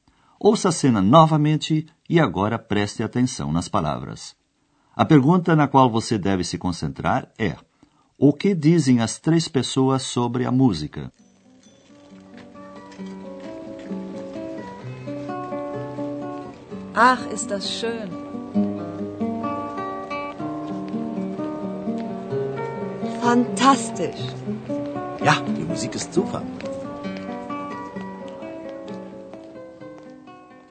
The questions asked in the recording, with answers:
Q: o que dizem as três pessoas sobre a música?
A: Os três ficaram entusiasmados com a música.